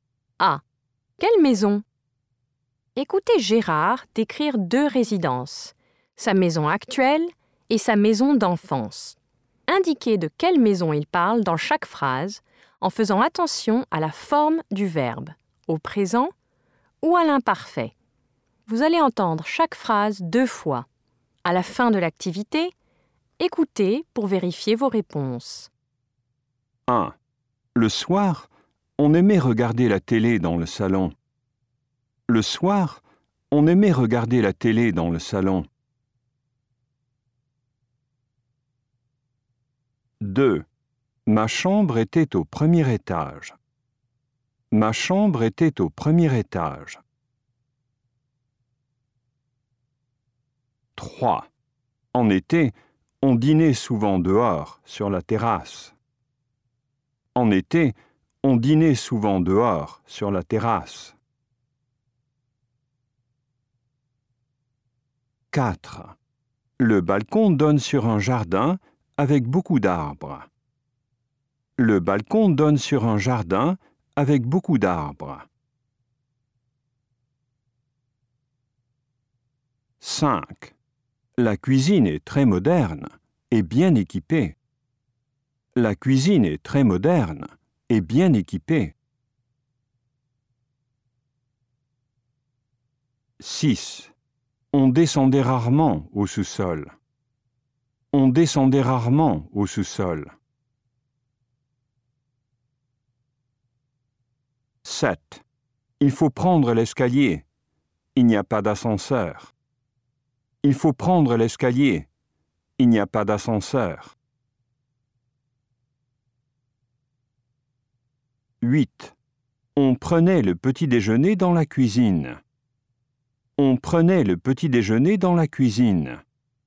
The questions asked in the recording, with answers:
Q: Le soir, on aimait regarder la télé dans le salon.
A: Sa maison d'enfance.

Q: Ma chambre était au premier étage.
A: Sa maison d'enfance.

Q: En été, on dînait souvent dehors, sur la terrasse.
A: Sa maison d'enfance.

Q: Le balcon donne sur un jardin avec beaucoup d'arbres.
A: Sa maison actuelle.

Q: La cuisine est très moderne et bien équipée.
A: Sa maison actuelle.

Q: On descendait rarement au sous-sol.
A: Sa maison d'enfance.

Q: Il faut prendre l'escalier.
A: Sa maison actuelle.

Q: On prenait le petit-déjeuner dans la cuisine.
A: Sa maison d'enfance.